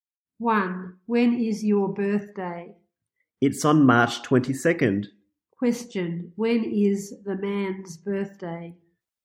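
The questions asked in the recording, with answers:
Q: Question. When is the man's birthday?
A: March 22nd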